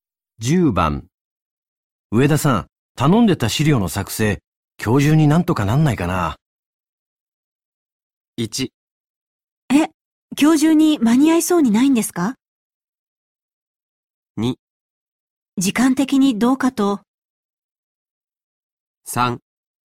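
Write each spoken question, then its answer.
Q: 上田さん、頼んでた資料の作成、今日中になんとかなんないかな。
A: 2: 時間的にどうかと。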